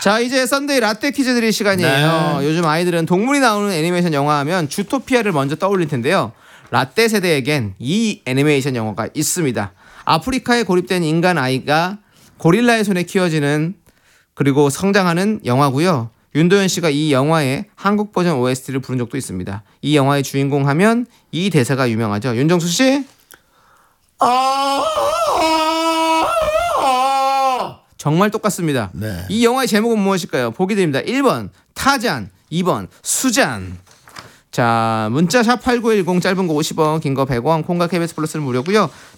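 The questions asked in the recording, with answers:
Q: 이 영화의 제목은 무엇일까요?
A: 1번: 타잔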